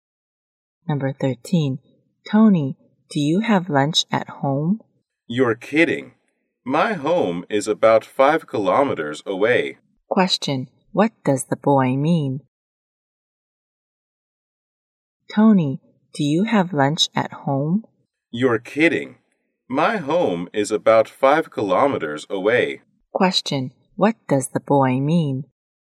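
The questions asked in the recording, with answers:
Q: What does the boy mean?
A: He doesn't have lunch at home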